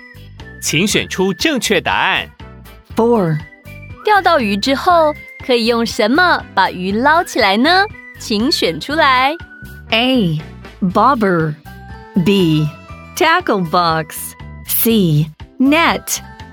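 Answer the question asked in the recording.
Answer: C: net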